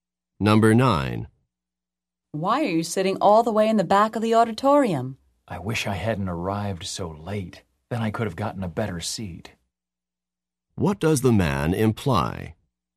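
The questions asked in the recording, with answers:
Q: What does the man imply?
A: He arrived late, so he couldn't get a better seat.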